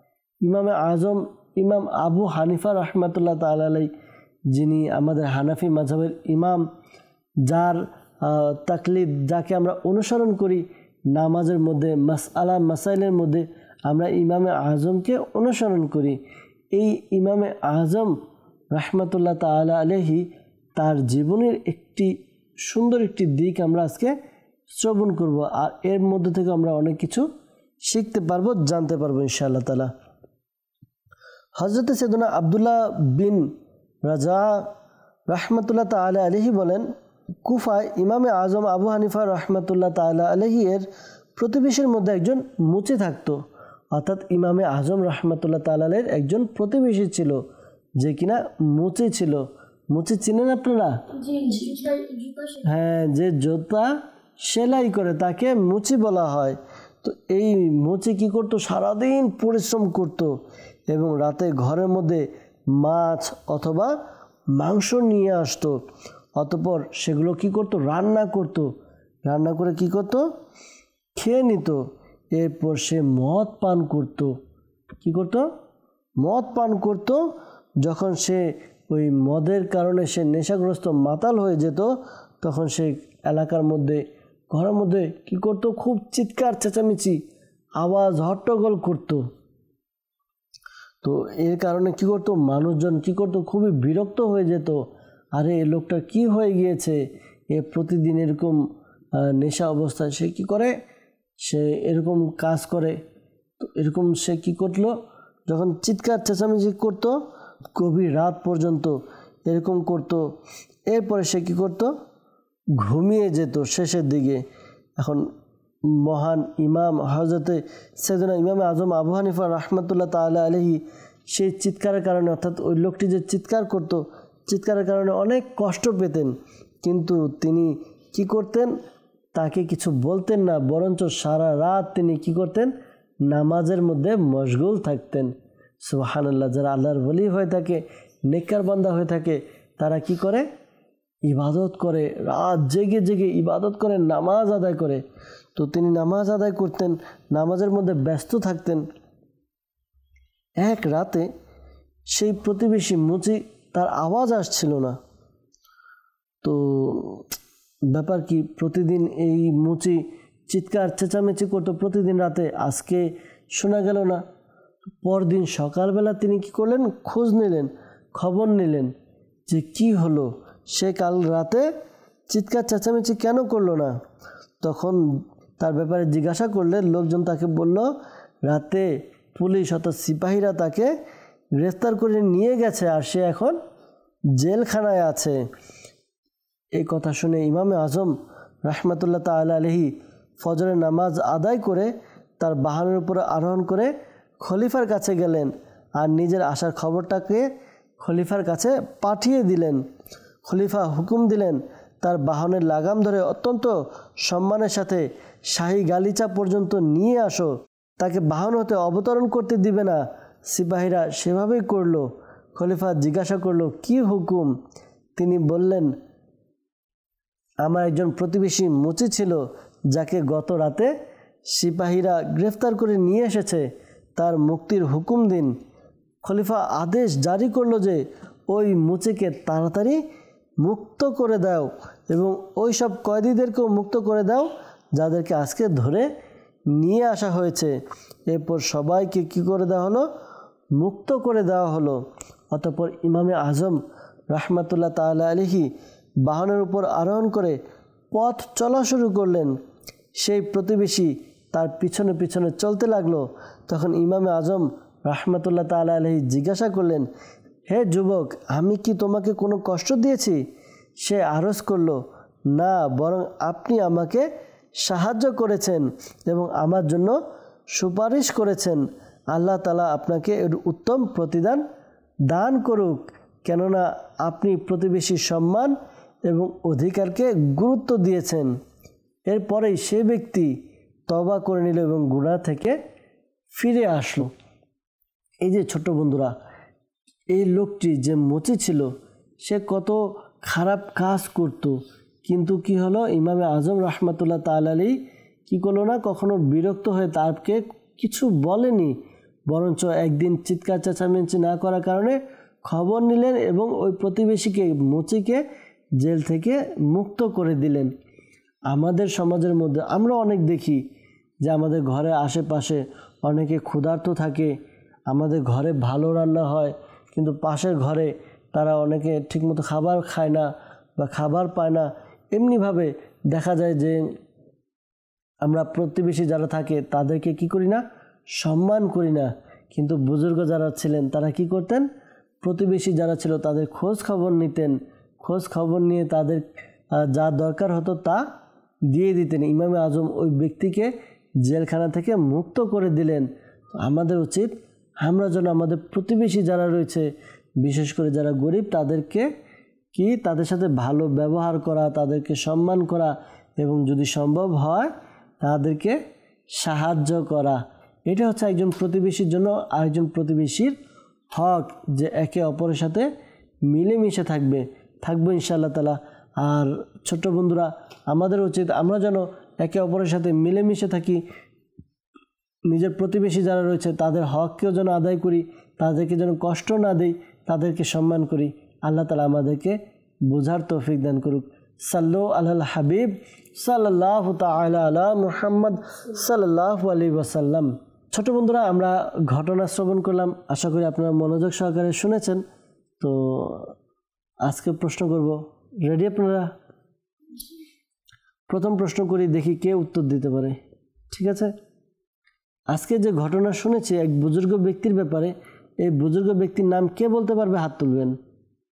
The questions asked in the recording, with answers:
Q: আজকে যে ঘটনা শুনেছি এক বুজুর্গ ব্যক্তির ব্যাপারে, এই বুজুর্গ ব্যক্তির নাম কে বলতে পারবে, হাত তুলবেন।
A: ইমামে আজম আবু হানিফা রহমাতুল্লাহি তাআলা আলাইহি।